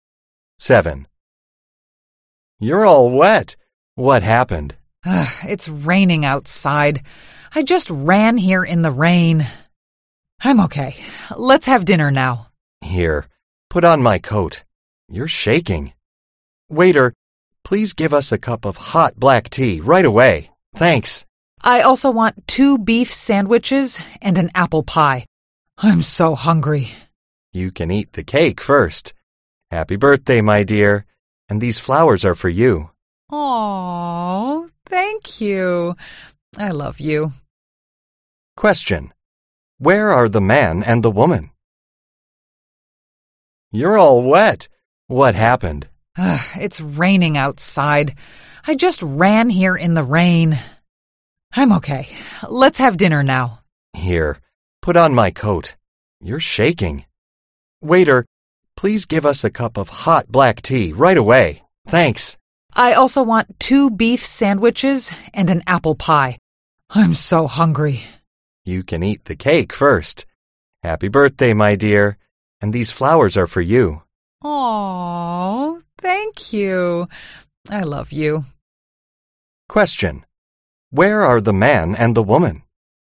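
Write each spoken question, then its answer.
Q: Where are the man and the woman?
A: In a restaurant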